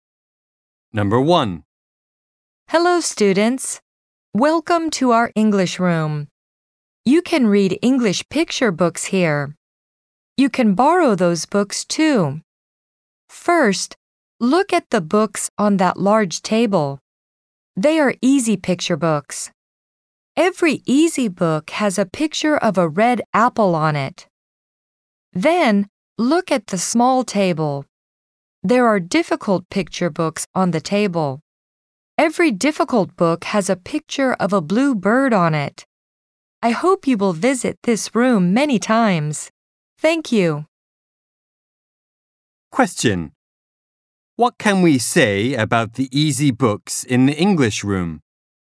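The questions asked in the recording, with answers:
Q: What can we say about the easy books in the English room?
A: Every easy book has a picture of a red apple on it.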